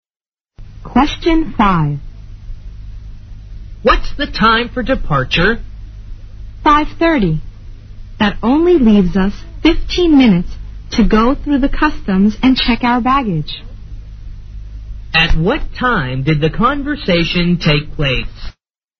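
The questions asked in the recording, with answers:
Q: At what time did the conversation take place?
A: 5:15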